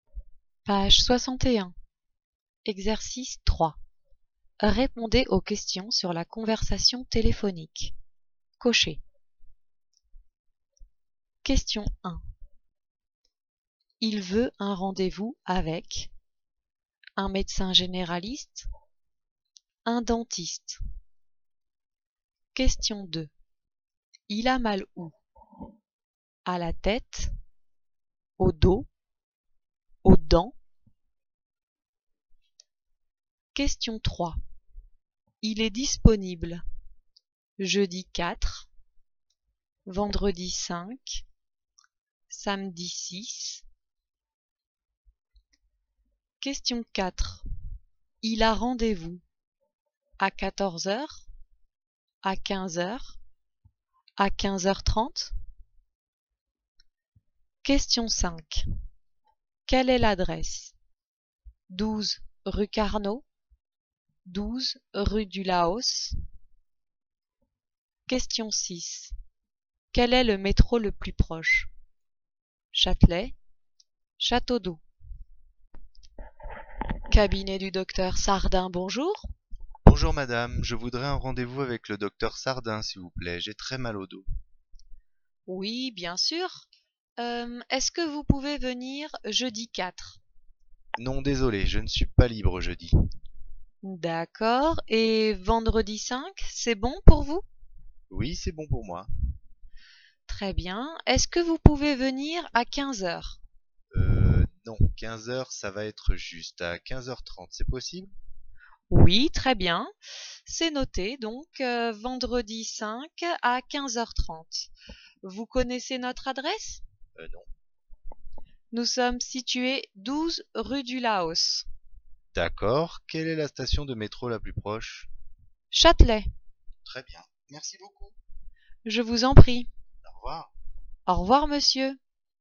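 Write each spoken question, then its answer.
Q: Il a mal où? À la tête, au dos, aux dents.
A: au dos

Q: Il est disponible jeudi 4, vendredi 5, samedi 6.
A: vendredi 5

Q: Il a rendez-vous à 14h, à 15h, à 15h30.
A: à 15h30

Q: Quelle est l'adresse?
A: 12 rue du Laos

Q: Quel est le métro le plus proche?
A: Châtelet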